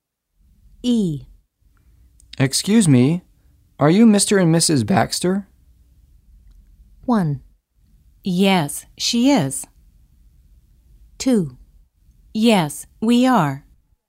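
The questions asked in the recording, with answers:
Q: Excuse me, are you Mr. and Mrs. Baxter?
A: 2: Yes, we are.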